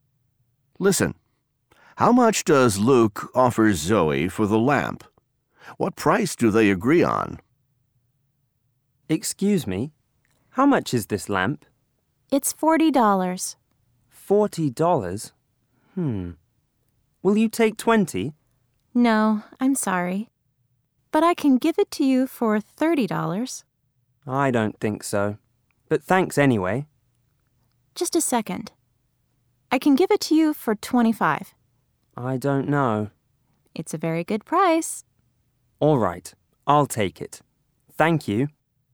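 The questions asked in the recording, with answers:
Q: How much does Luke offer Zoe for the lamp?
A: $20

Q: What price do they agree on?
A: $25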